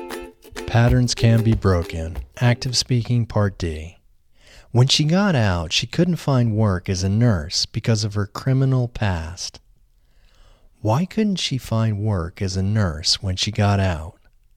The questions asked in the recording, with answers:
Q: Why couldn't she find work as a nurse when she got out?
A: She couldn't find work as a nurse when she got out because of her criminal past.